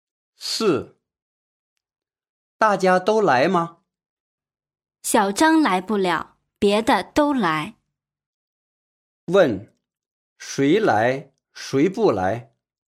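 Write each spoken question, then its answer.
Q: 问,谁来,谁不来?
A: 小张不来,别的人都来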